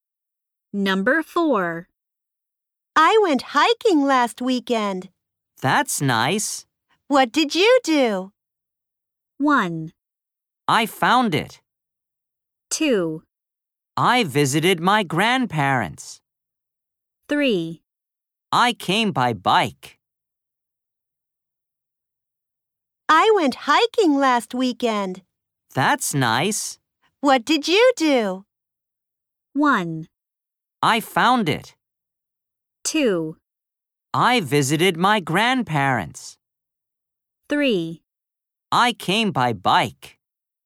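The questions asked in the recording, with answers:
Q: What did you do?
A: 2: I visited my grandparents.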